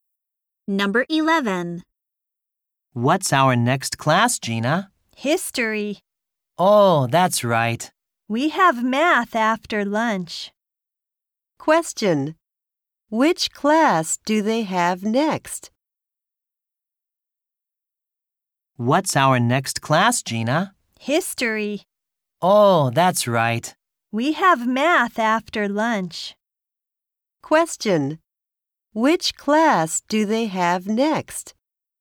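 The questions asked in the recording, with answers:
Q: Which class do they have next?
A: History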